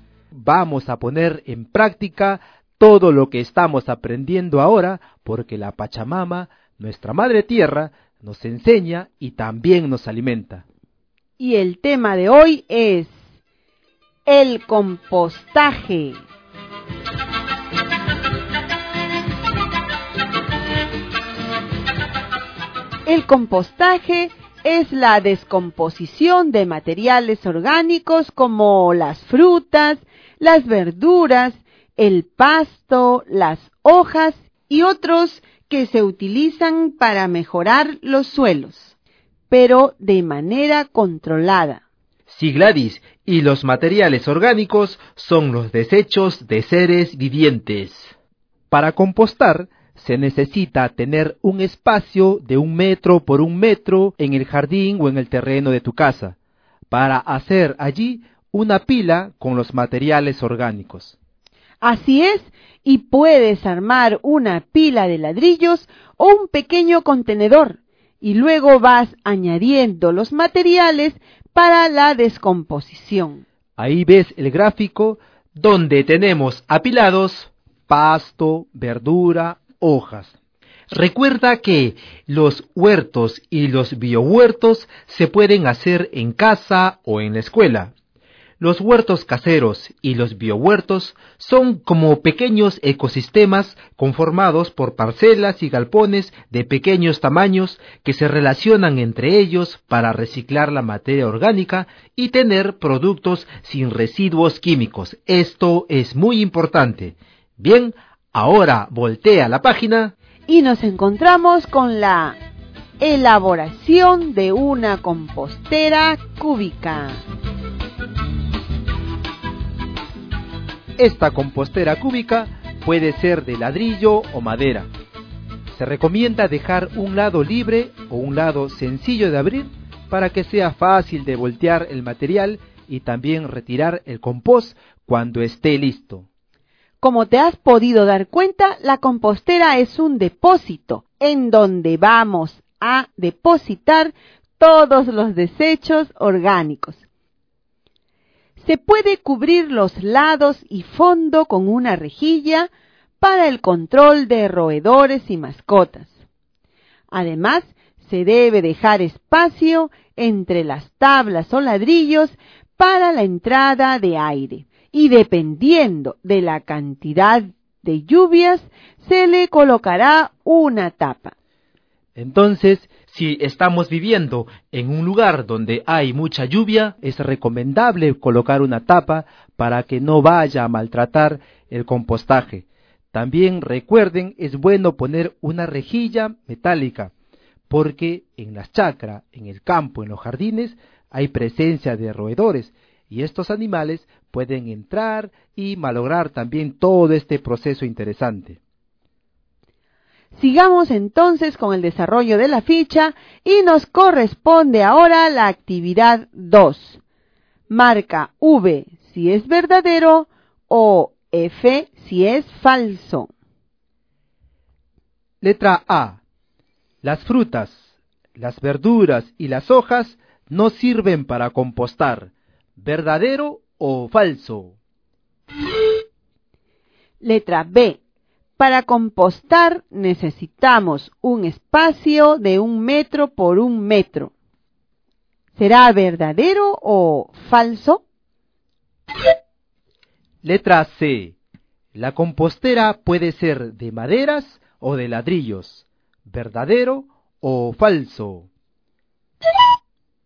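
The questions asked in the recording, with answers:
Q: Las frutas, las verduras y las hojas no sirven para compostar.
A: Falso

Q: Para compostar necesitamos un espacio de 1 metro por 1 metro.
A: Verdadero

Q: La compostera puede ser de maderas o de ladrillos.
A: Verdadero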